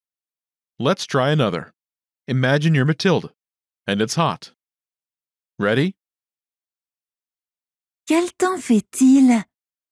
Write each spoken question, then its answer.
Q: Quel temps fait-il?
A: Il fait chaud.